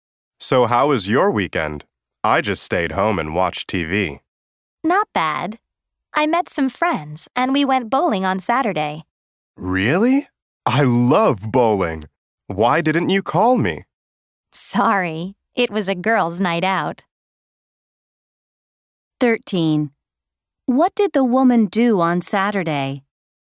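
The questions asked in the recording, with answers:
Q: What did the woman do on Saturday?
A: She went bowling with friends.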